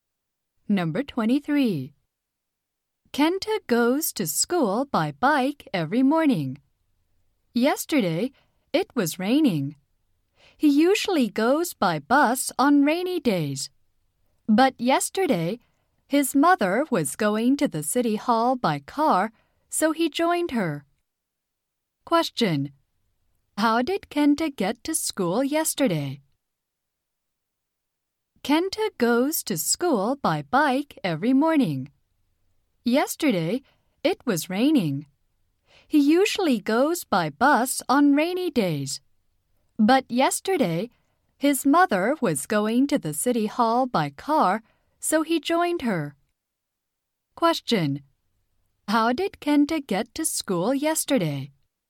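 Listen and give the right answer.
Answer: By car with his mother.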